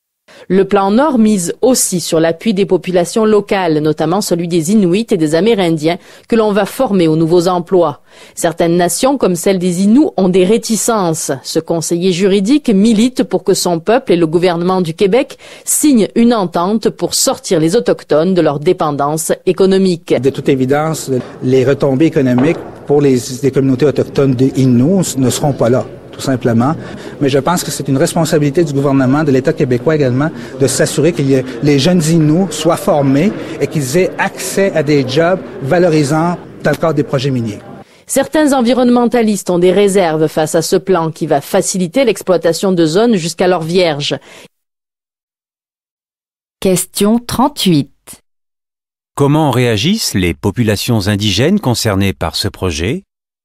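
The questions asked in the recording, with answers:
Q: Comment réagissent les populations indigènes concernées par ce projet?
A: Certaines, comme les Inuits, ont des réticences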